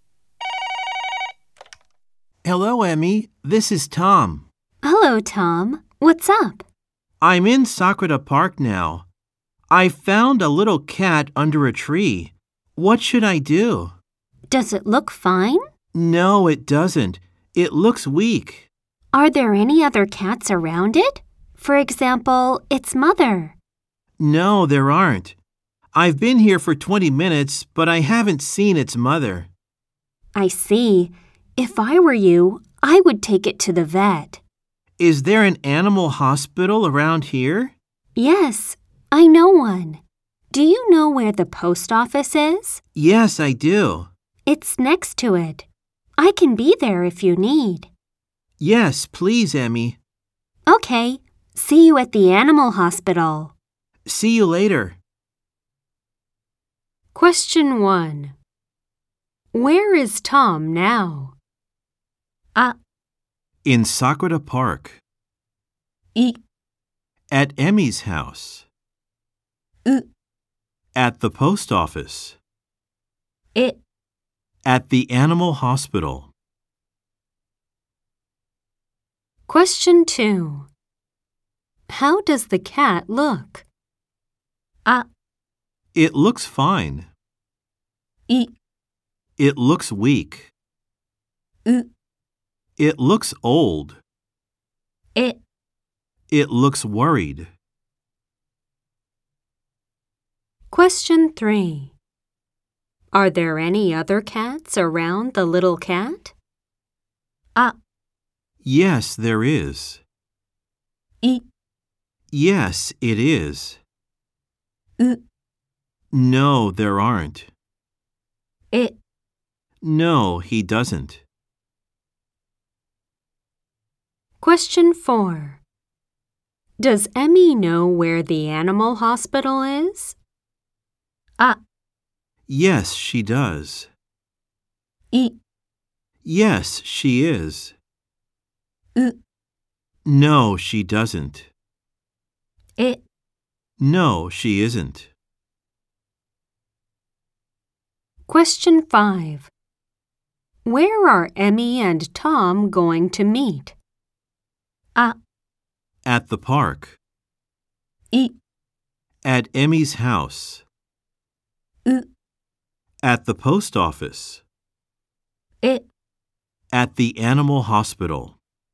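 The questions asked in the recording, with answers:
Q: Where is Tom now?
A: あ: In Sakura Park.

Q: How does the cat look?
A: い: It looks weak.

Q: Are there any other cats around the little cat?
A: う: No, there aren't.

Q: Does Emmy know where the animal hospital is?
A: あ: Yes, she does.

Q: Where are Emmy and Tom going to meet?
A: え: At the animal hospital.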